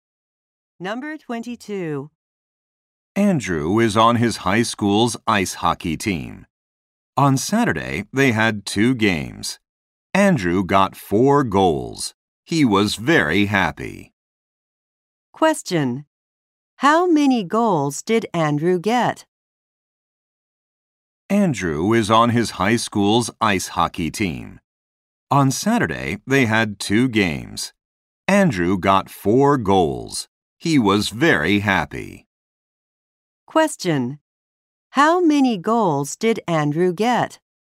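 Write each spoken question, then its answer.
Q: How many goals did Andrew get?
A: Four.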